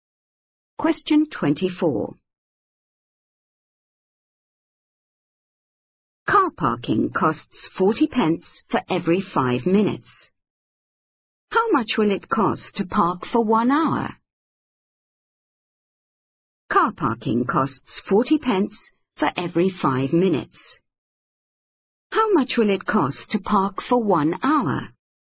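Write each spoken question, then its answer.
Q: How much will it cost to park for 1 hour?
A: £4.80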